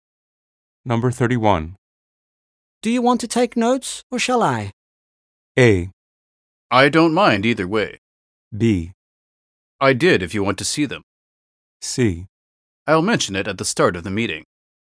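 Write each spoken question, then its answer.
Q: Do you want to take notes or shall I?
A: A: I don't mind either way.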